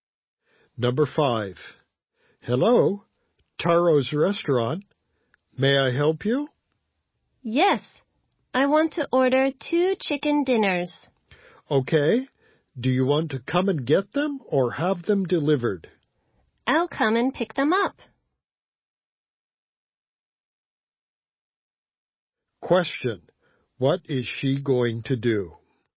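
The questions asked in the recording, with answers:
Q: what is she going to do?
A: Go to the restaurant and pick up two chicken dinners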